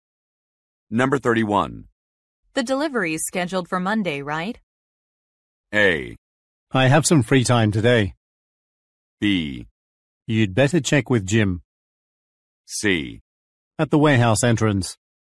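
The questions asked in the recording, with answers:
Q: The delivery is scheduled for Monday, right?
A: B: You'd better check with Jim.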